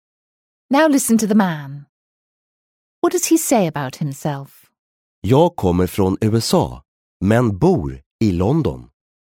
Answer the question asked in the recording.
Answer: He said he comes from the US but lives in London.